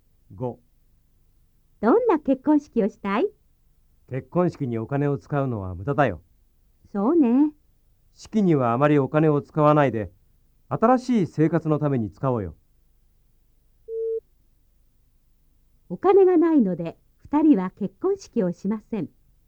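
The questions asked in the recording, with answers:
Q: お金がないので2人は結婚式をしません。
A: ×(結婚式にあまりお金を使わないだけ)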